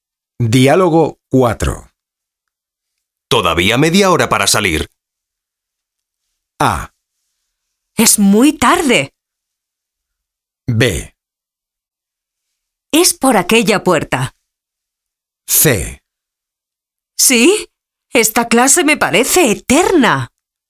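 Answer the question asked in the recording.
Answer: C: ¿Sí? Esta clase me parece eterna.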